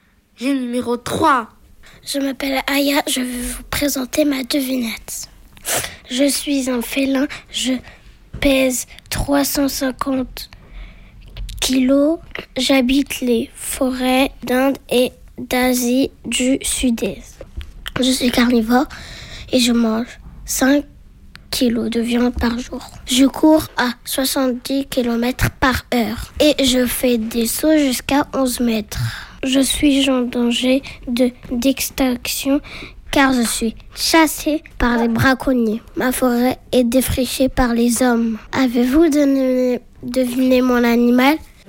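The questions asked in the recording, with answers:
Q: Avez-vous deviné mon animal ?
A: le tigre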